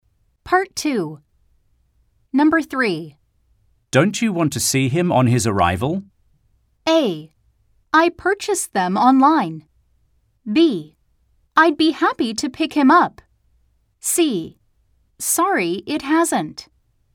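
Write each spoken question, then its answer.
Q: Don't you want to see him on his arrival?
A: B: I'd be happy to pick him up.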